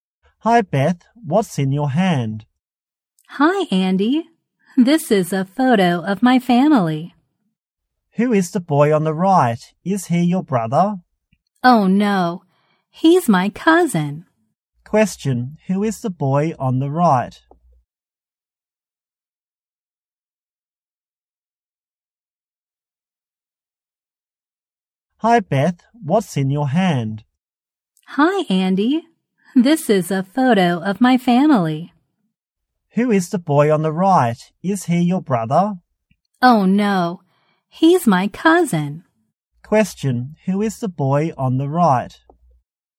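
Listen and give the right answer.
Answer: Beth's cousin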